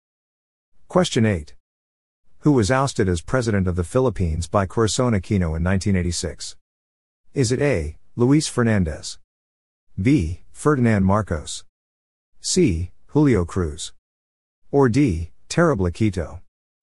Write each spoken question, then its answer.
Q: Who was ousted as president of the Philippines by Corazon Aquino in 1986?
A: The answer is B, Ferdinand Marcos.